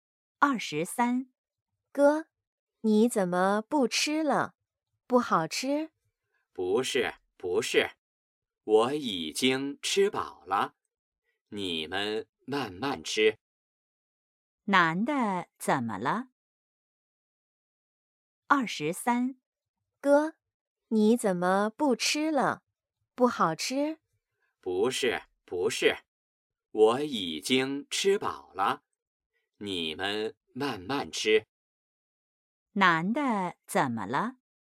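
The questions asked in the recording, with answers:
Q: 男的怎么了?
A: 吃饱了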